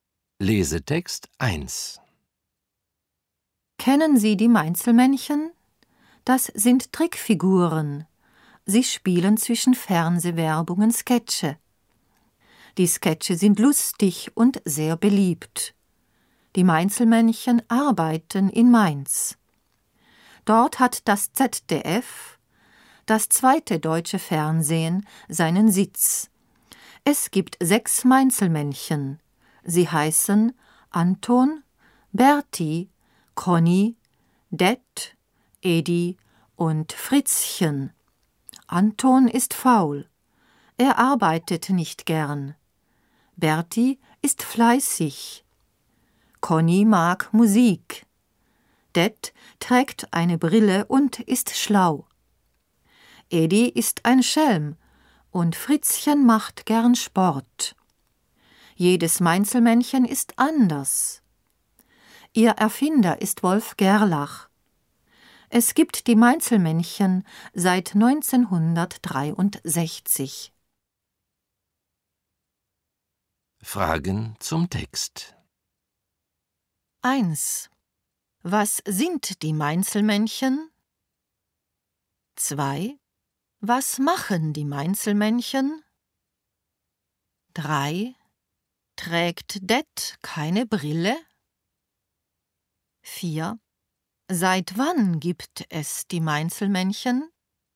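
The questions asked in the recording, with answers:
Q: Was sind die Mainzelmännchen?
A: Trickfiguren

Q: Was machen die Mainzelmännchen?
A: Sie spielen zwischen Fernsehwerbungen Sketche.

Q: Trägt Det keine Brille?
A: Doch, Det trägt eine Brille.

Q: Seit wann gibt es die Mainzelmännchen?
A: Seit 1963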